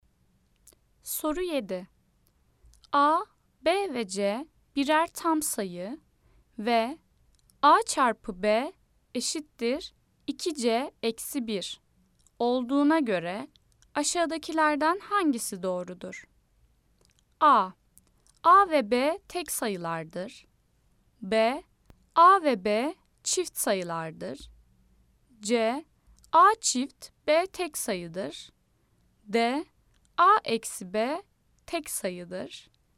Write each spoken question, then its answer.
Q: A, B ve C birer tam sayı ve A çarpı B eşittir 2C eksi 1 olduğuna göre aşağıdakilerden hangisi doğrudur?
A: Cevap Adana, A ve B tek sayılardır.